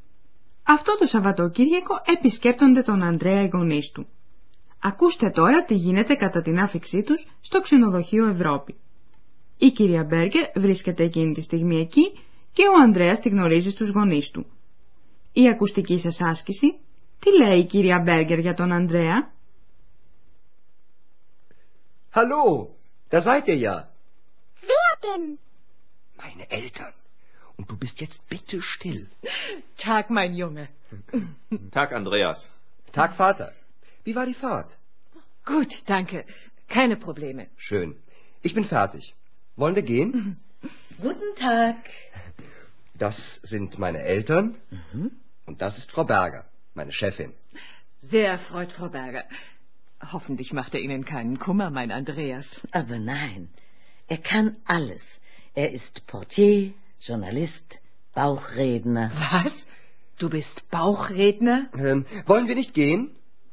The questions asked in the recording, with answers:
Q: Η ακουστική σας άσκηση, τι λέει η κυρία Μπέργκερ για τον Ανδρέα?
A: Ίσως να καταλάβατε πως η κυρία Μπέρκερ επενεί τον Ανδρέα.